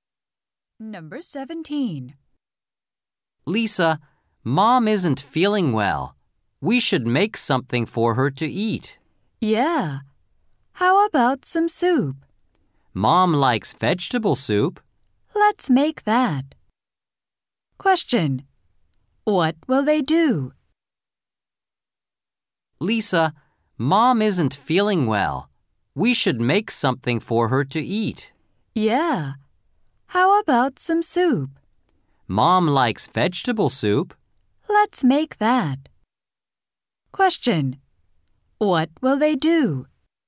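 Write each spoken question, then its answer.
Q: What will they do?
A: Make vegetable soup for their mother.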